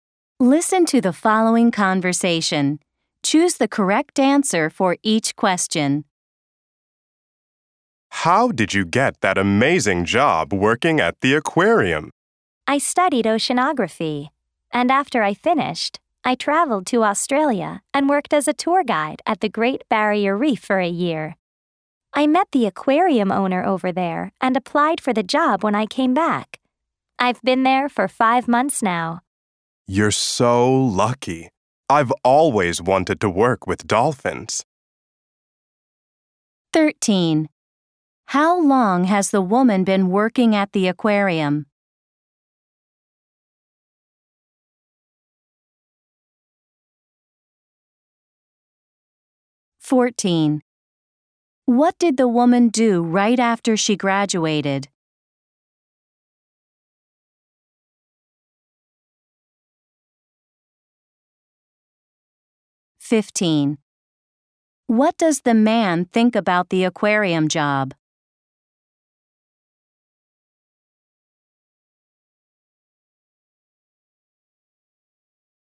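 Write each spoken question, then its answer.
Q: How long has the woman been working at the aquarium?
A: 5 months

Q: What did the woman do right after she graduated?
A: She went to Australia and worked as a tour guide at the Great Barrier Reef

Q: What does the man think about the aquarium job?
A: He thinks she is lucky; he has always wanted to work with dolphins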